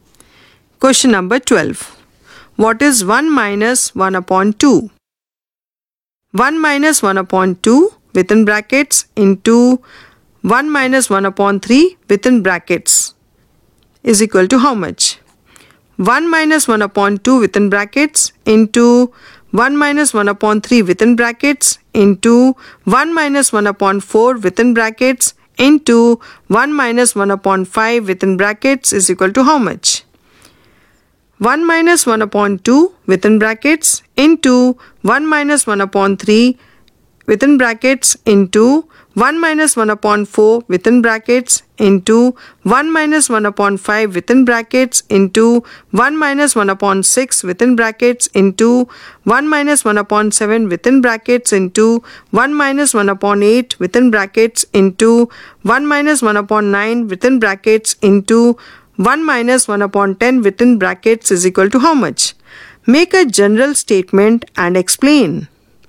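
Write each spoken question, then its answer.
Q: What is 1 minus 1 upon 2?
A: 1/2

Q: 1 minus 1 upon 2 within brackets into 1 minus 1 upon 3 within brackets is equal to how much?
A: 1/3

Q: 1 minus 1 upon 2 within brackets into 1 minus 1 upon 3 within brackets into 1 minus 1 upon 4 within brackets into 1 minus 1 upon 5 within brackets is equal to how much?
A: 1/5

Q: 1 minus 1 upon 2 within brackets into 1 minus 1 upon 3 within brackets into 1 minus 1 upon 4 within brackets into 1 minus 1 upon 5 within brackets into 1 minus 1 upon 6 within brackets into 1 minus 1 upon 7 within brackets into 1 minus 1 upon 8 within brackets into 1 minus 1 upon 9 within brackets into 1 minus 1 upon 10 within brackets is equal to how much?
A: 1/10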